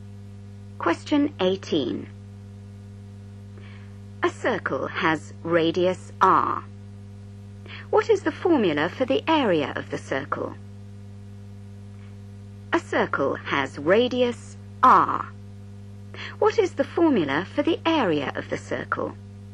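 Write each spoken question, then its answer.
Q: What is the formula for the area of the circle?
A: A = πR2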